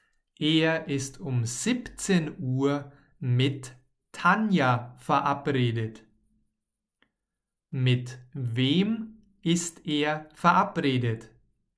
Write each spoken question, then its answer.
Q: Mit wem ist er verabredet?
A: Mit Tanja. Peter ist mit Tanja verabredet.